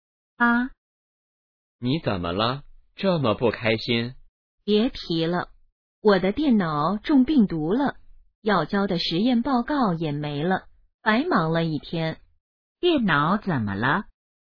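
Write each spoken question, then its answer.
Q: 电脑怎么了?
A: 中病毒了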